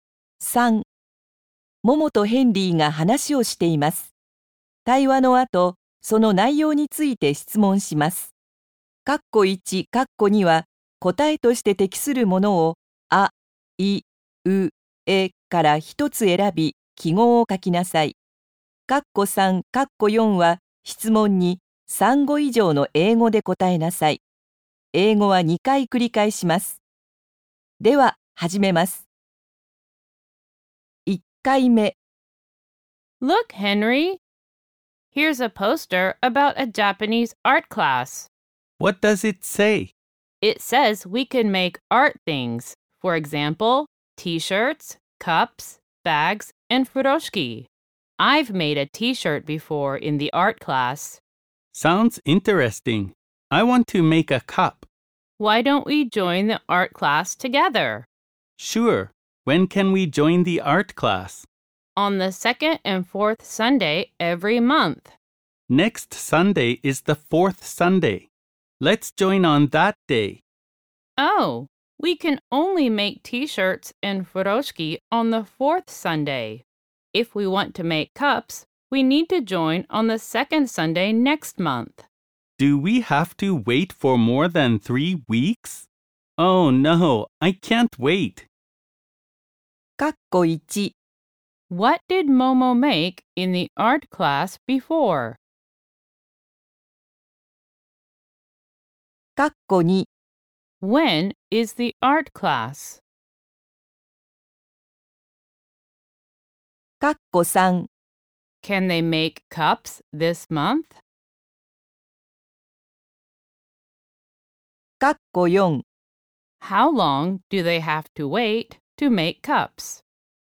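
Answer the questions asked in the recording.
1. A T-shirt
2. On the second and fourth Sunday every month
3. No, they can't.
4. More than three weeks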